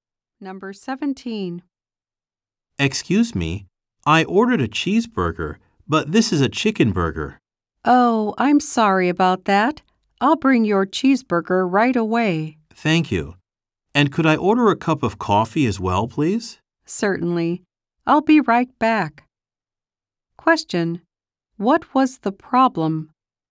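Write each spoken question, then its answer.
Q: What was the problem?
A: The man got a chicken burger instead of a cheeseburger.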